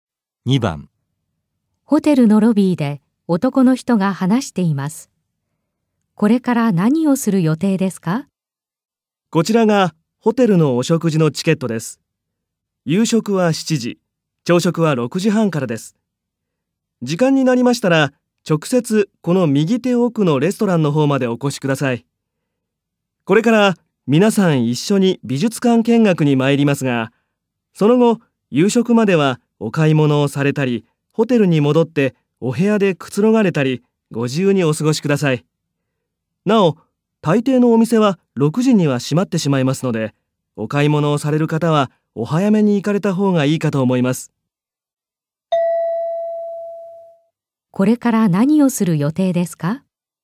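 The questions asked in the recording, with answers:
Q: これから何をする予定ですか?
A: 皆さん一緒に美術館見学に行く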